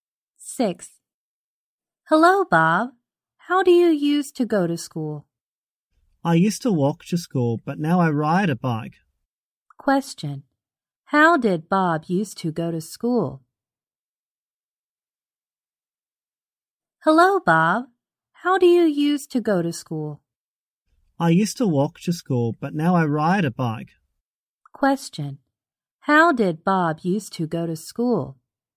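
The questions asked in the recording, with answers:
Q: How did Bob used to go to school?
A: He walked to school.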